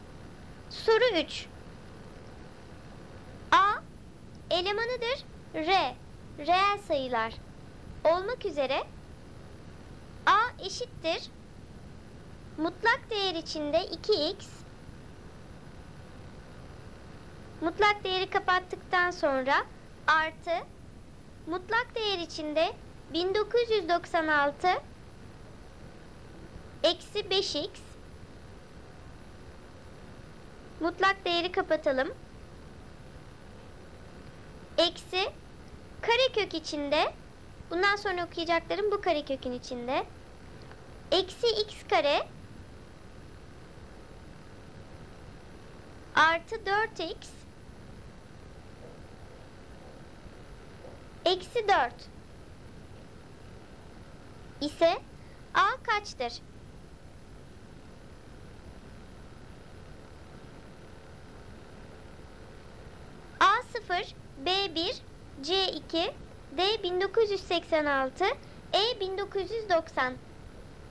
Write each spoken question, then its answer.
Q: ise a kaçtır?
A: Doğru cevap E 1990.